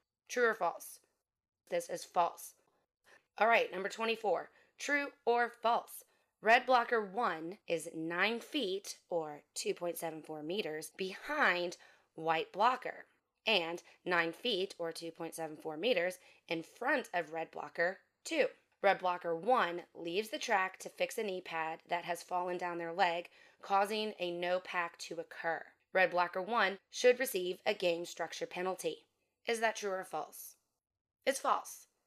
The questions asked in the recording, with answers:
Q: Red blocker 1 should receive a game structure penalty.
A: It's false.